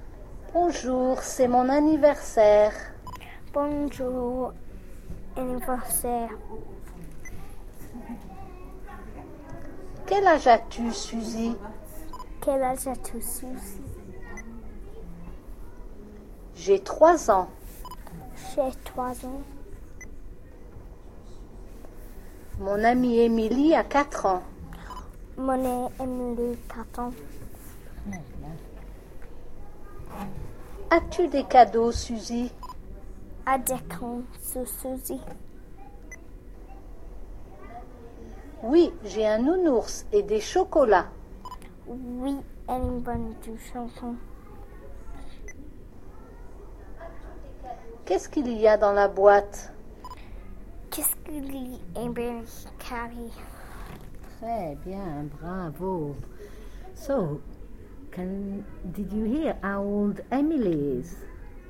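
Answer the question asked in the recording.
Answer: 4 years old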